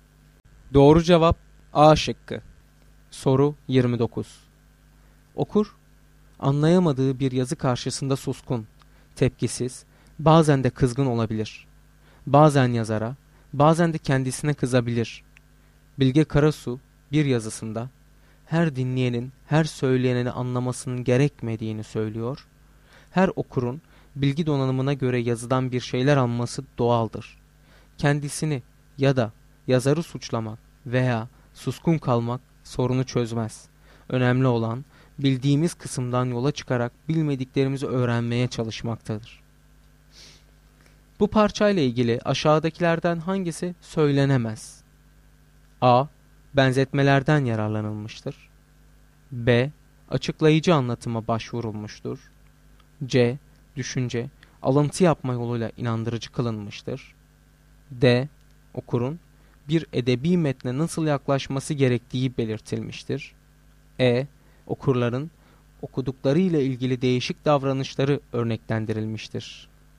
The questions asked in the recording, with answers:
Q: Bu parçayla ilgili aşağıdakilerden hangisi söylenemez?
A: Doğru cevap A şıkkı.